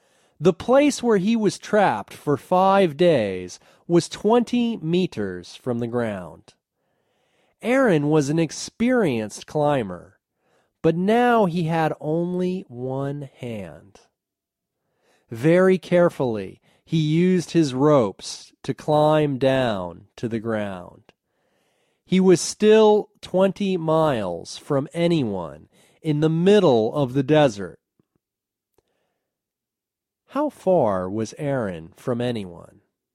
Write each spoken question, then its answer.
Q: How far was Aaron from anyone?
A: He was 20 miles from anyone.